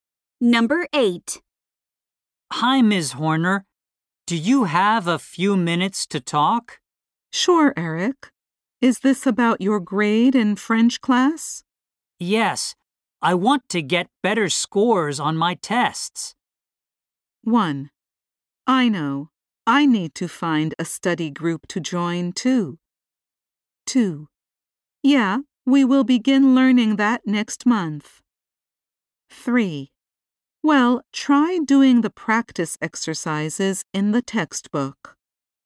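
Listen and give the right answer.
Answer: 3: Well, try doing the practice exercises in the textbook.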